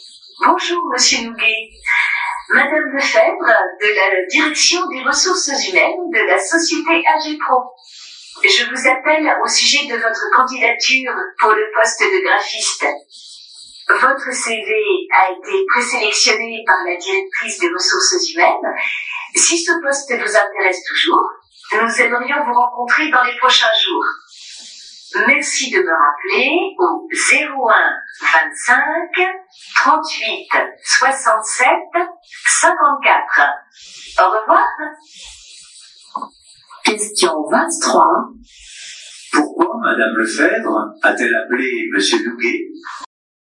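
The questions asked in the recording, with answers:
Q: Pourquoi Madame Lefebvre a-t-elle appelé Monsieur Nouguet ?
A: Pour lui proposer un entretien pour le poste de graphiste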